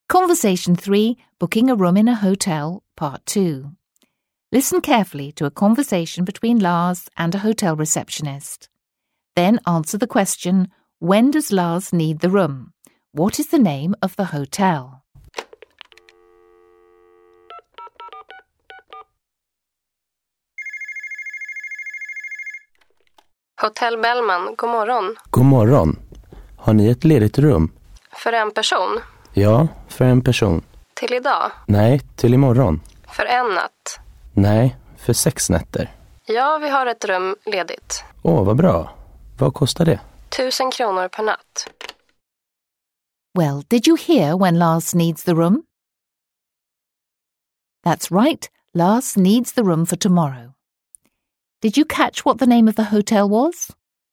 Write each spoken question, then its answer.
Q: What is the name of the hotel?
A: Yes, it's Hotel Bellman.